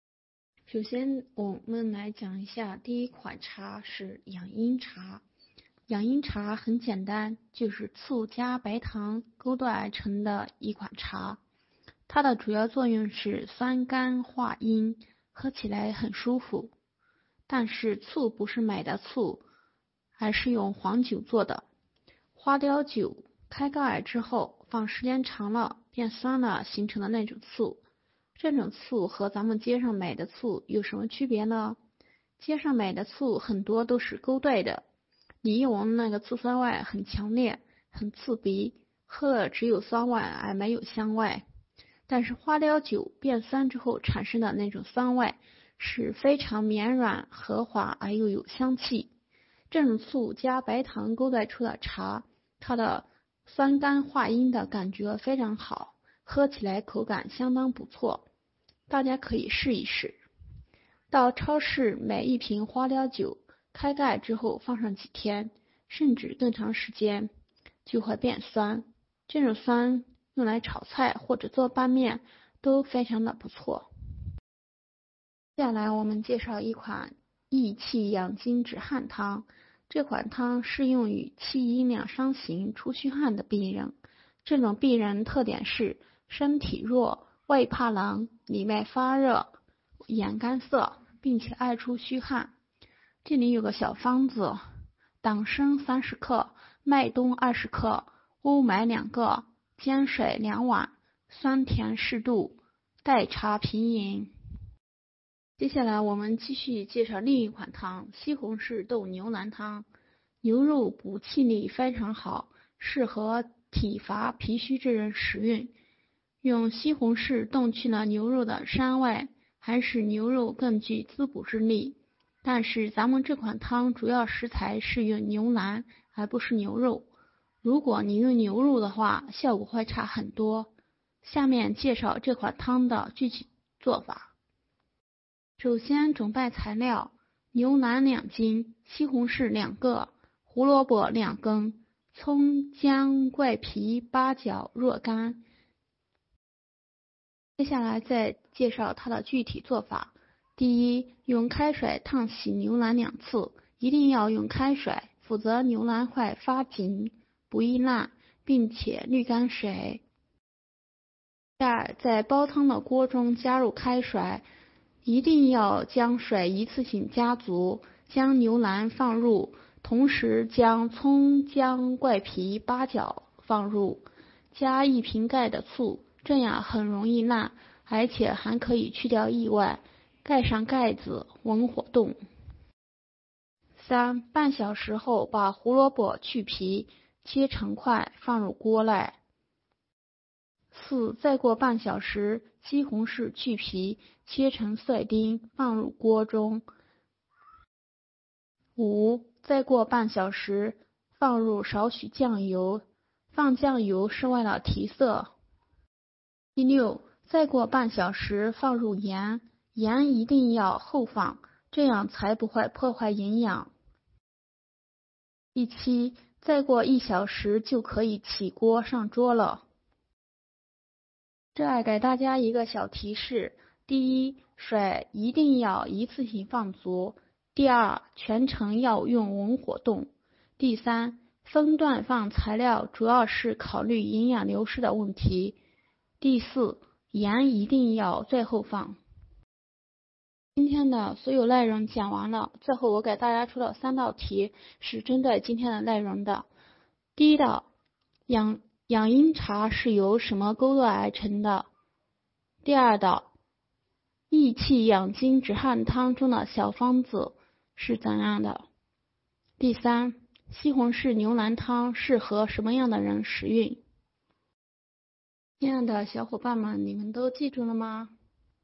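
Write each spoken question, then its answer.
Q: 养阴茶是由什么勾兑而成的?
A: 醋(花雕酒变酸形成的醋)加白糖

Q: 益气养筋止汗汤中的小方子是怎样的?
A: 党参30克,麦冬20克,乌梅2个,煎水2碗,代茶平饮

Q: 西红柿牛腩汤适合什么样的人食用?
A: 体乏脾虚之人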